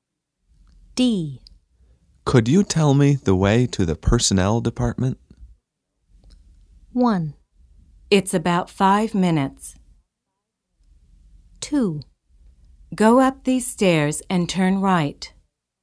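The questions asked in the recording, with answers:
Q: Could you tell me the way to the personnel department?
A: 2: Go up these stairs and turn right.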